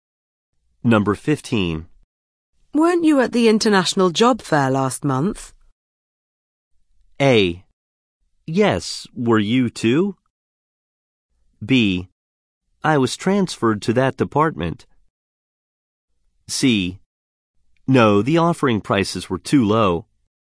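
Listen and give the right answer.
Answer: A: Yes, were you too?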